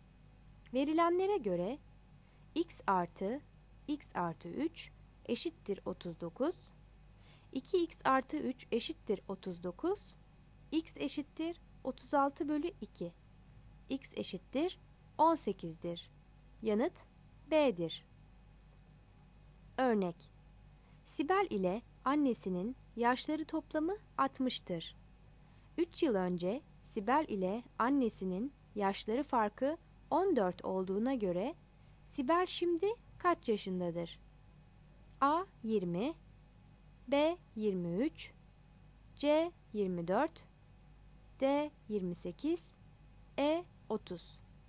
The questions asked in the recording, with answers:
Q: 3 yıl önce Sibel ile annesinin yaşları farkı 14 olduğuna göre Sibel şimdi kaç yaşındadır?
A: Yanıt B'dir.